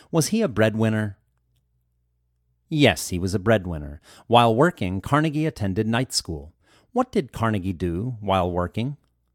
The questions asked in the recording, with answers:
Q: What did Carnegie do while working?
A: Carnegie attended night school while working.